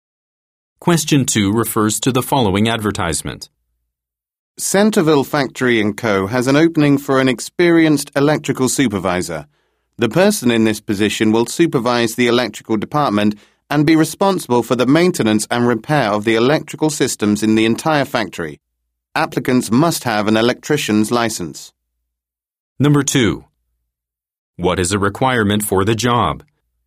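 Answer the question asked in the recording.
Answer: An electrician's license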